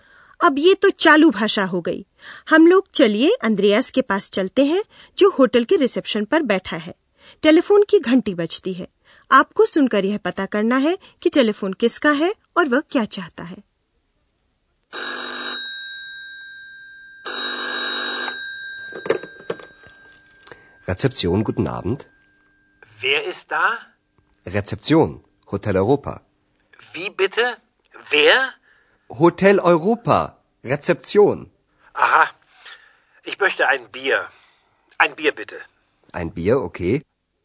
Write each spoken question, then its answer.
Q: वह क्या चाहता है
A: फोन करने वाला एक beer चाहता है